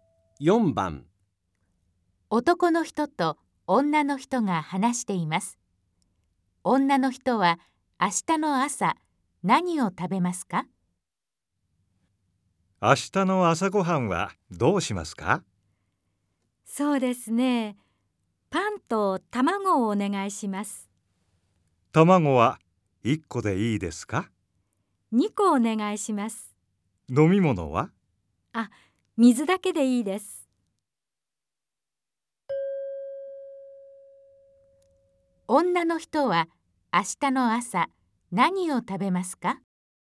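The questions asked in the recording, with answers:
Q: 女の人は明日の朝何を食べますか?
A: パンと卵2個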